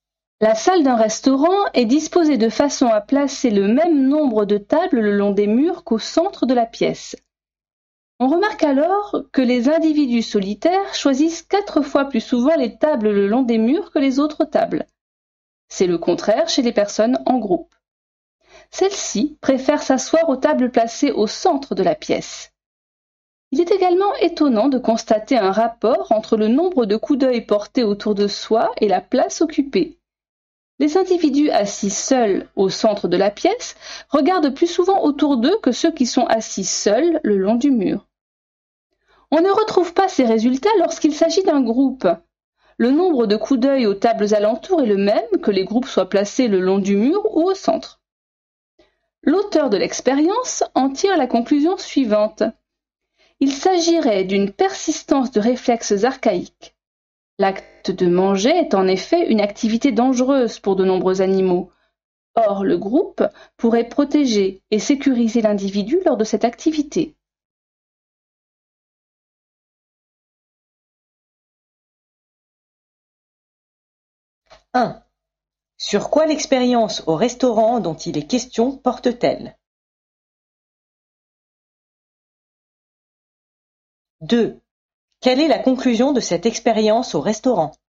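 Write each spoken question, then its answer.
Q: Sur quoi l'expérience au restaurant dont il est question porte-t-elle?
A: Sur le choix de la place à table (mur ou centre) selon qu'on est seul ou en groupe, et les coups d'œil portés autour de soi

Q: Quelle est la conclusion de cette expérience au restaurant?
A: Il s'agirait d'une persistance de réflexes archaïques : manger est dangereux, et le groupe protège l'individu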